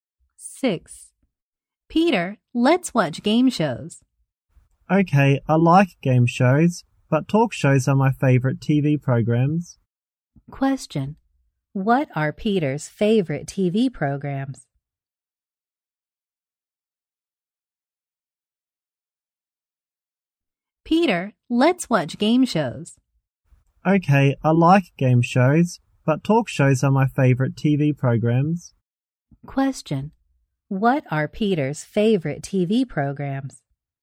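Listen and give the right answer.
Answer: Talk shows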